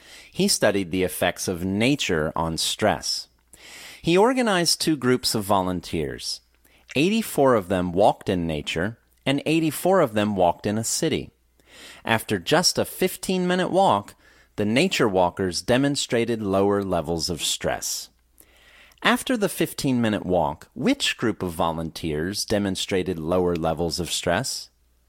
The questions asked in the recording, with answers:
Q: After the 15-minute walk, which group of volunteers demonstrated lower levels of stress?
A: After the 15-minute walk, the nature walkers demonstrated lower levels of stress.